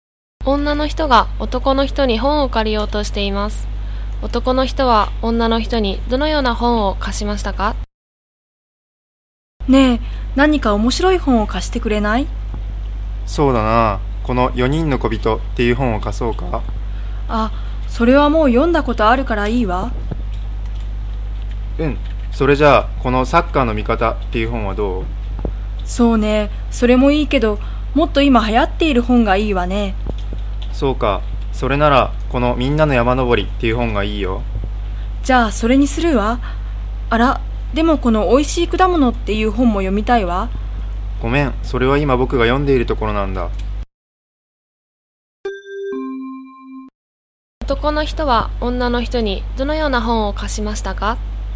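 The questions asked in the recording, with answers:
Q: 男の人は女の人にどのような本を貸しましたか?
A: みんなの山登りという本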